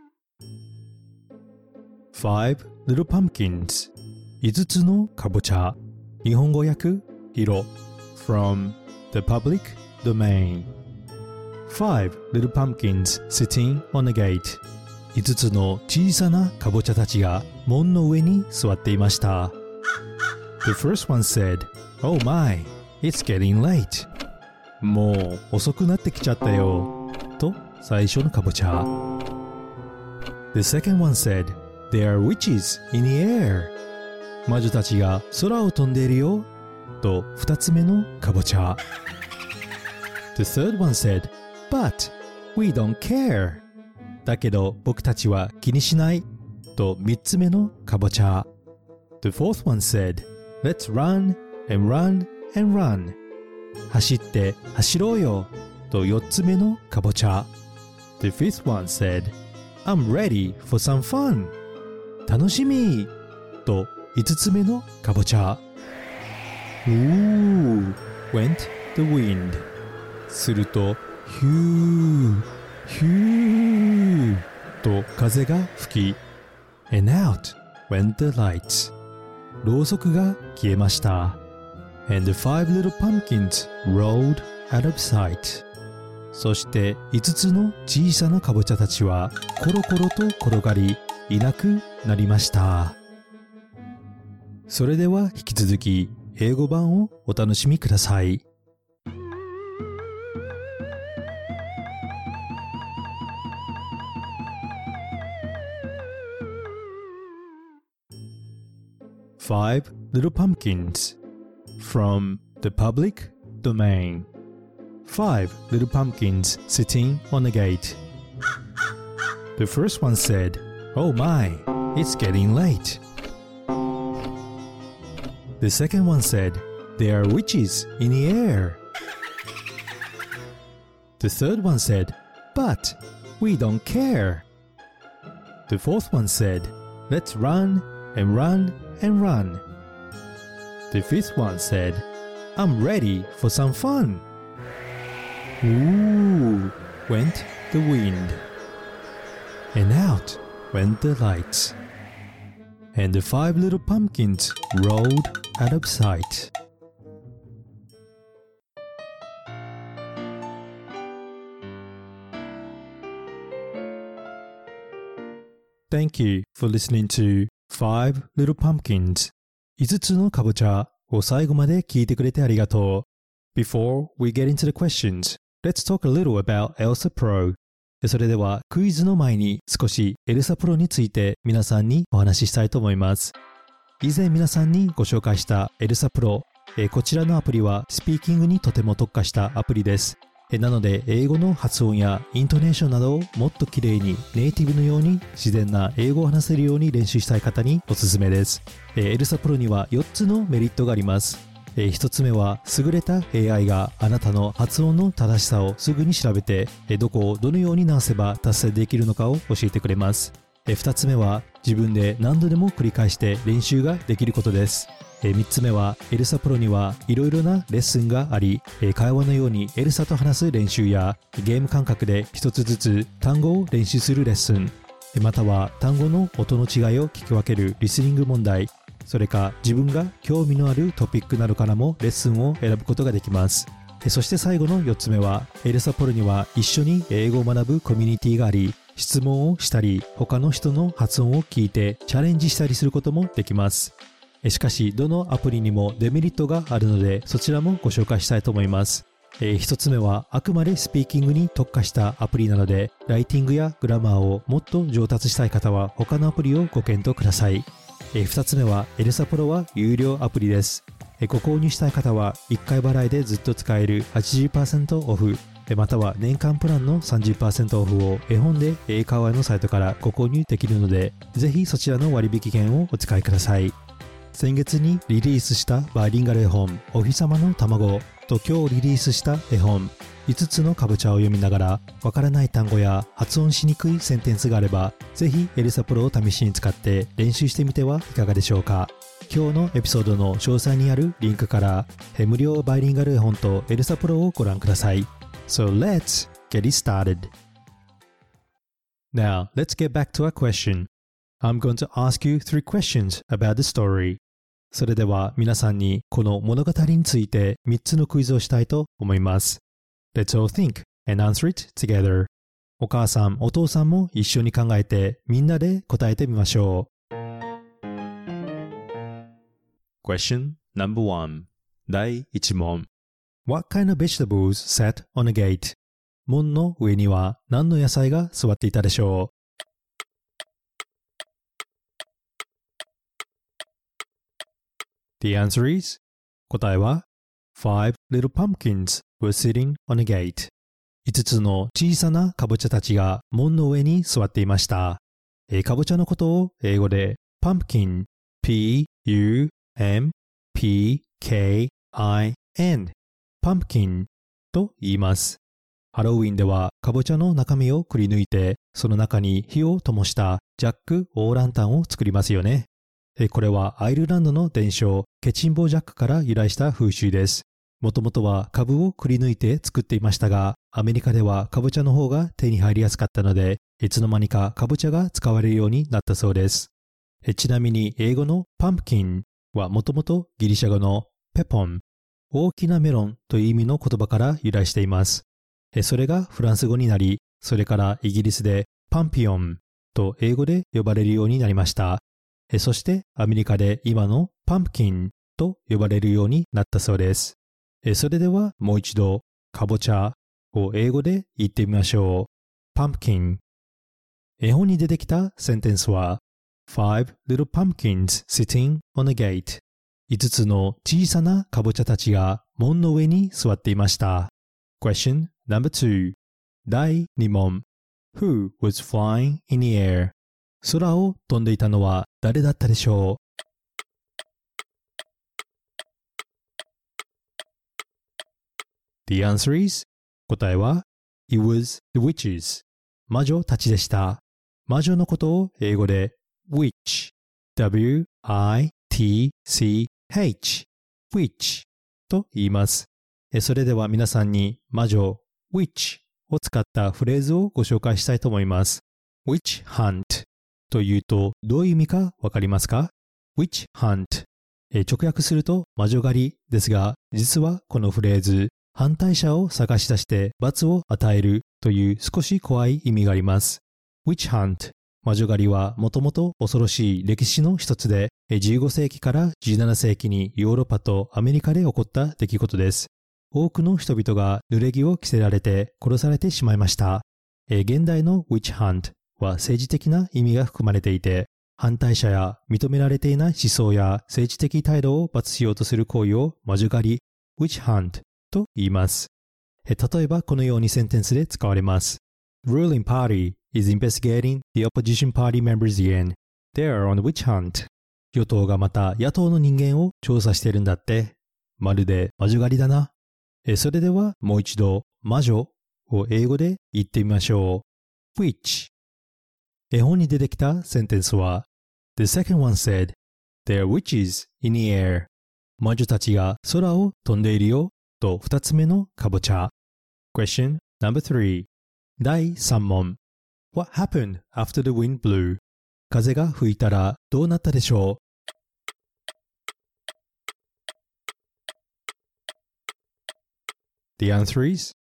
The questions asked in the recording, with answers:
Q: What kind of vegetables sat on a gate?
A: Five little pumpkins were sitting on a gate.

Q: Who was flying in the air?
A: It was the witches

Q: What happened after the wind blew?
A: Out when the lights and five pumpkins rolled out of sight